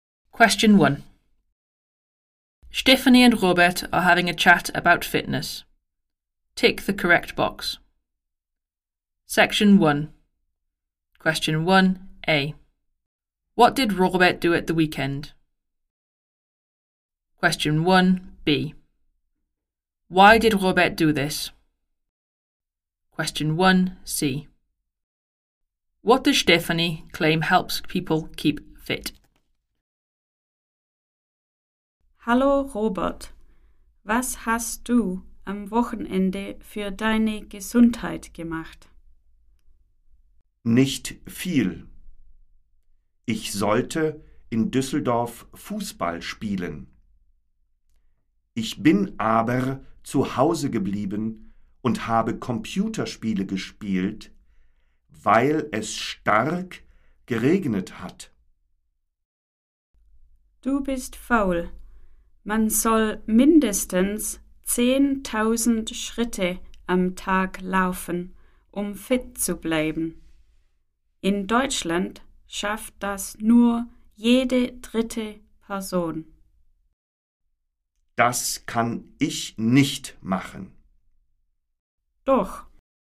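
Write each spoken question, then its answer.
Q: What did Robert do at the weekend?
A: He stayed at home and played computer games

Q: Why did Robert do this?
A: Because it was raining heavily

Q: What does Stephanie claim helps people keep fit?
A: Walking at least 10,000 steps a day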